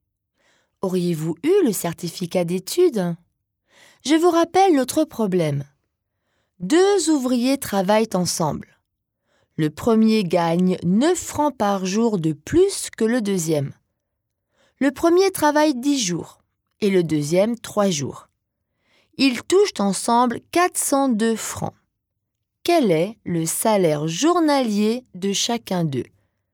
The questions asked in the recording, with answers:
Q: Quel est le salaire journalier de chacun d'eux ?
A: Le salaire journalier du premier est donc de 24 plus 9, c'est-à-dire de 33 francs.